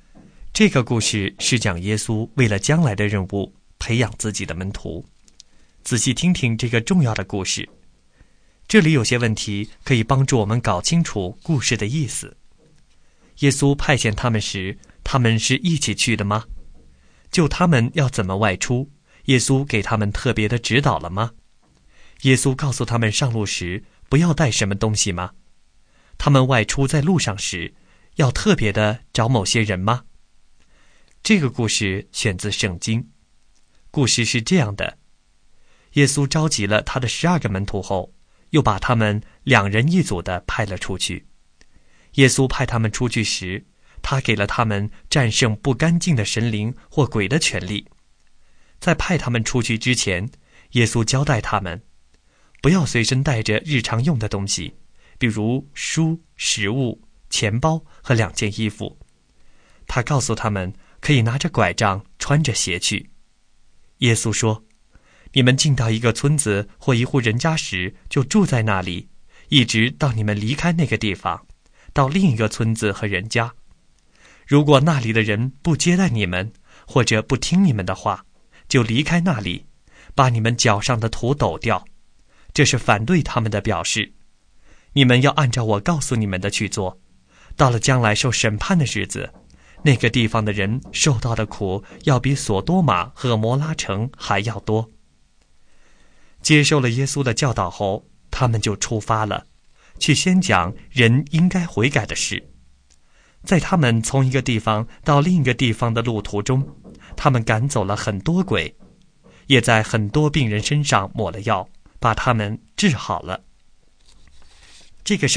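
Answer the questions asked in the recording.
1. 不是,两人一组去的
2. 不要带书、食物、钱包和两件衣服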